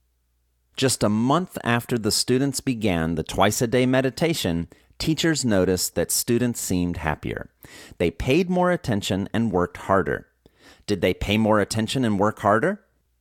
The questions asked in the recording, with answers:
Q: Did they pay more attention and work harder?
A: Yes, they paid more attention and worked harder.